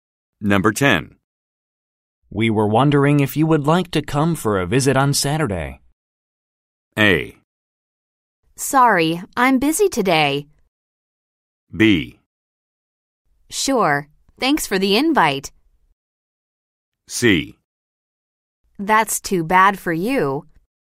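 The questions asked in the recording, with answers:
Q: We were wondering if you would like to come for a visit on Saturday.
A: B: Sure. Thanks for the invite.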